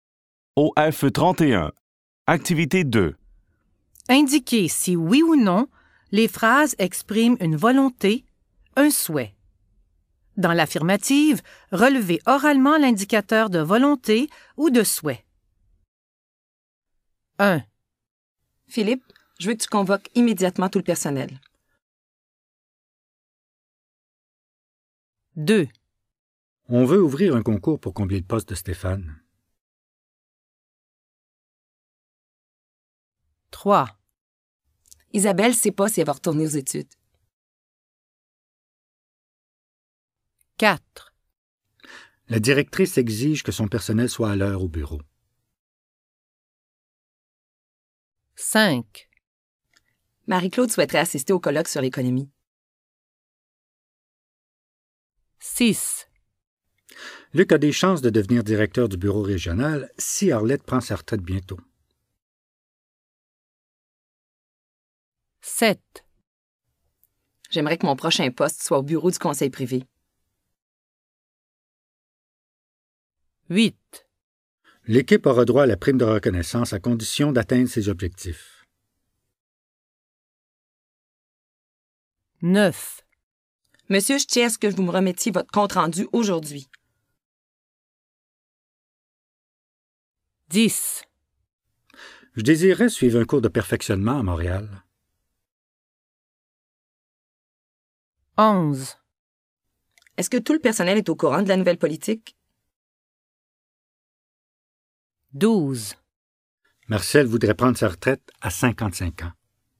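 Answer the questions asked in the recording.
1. Oui : je veux que
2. Oui : on veut
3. Non
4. Oui : exige que
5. Oui : souhaiterait
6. Non
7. Oui : j'aimerais que
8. Non
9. Oui : je tiens à ce que
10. Oui : je désirerais
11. Non
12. Oui : voudrait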